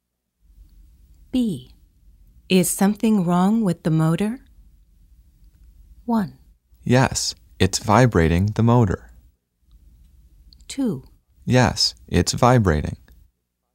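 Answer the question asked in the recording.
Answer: 2: Yes, it's vibrating.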